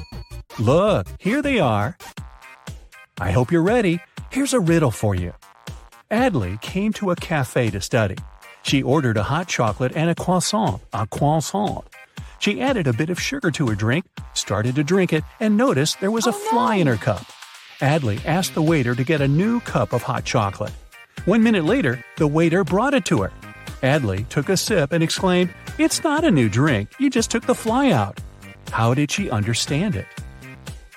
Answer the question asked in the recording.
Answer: Well, the supposedly new drink was already sweet.